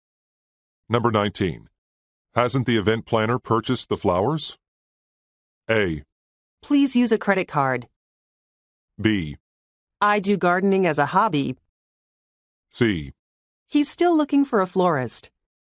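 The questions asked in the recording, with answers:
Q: Hasn't the event planner purchased the flowers?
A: C: He's still looking for a florist.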